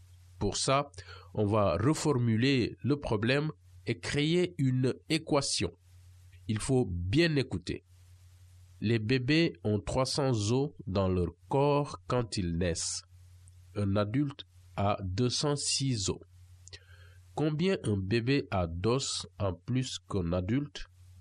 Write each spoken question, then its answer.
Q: Combien un bébé a d'os en plus qu'un adulte?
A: Et la réponse, c'est 94.